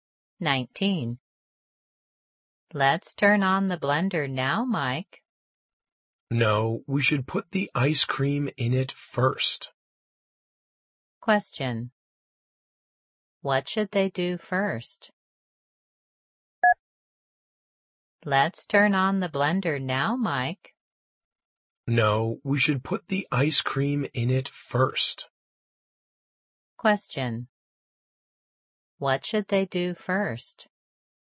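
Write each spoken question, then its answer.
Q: What should they do first?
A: Put the ice cream in the blender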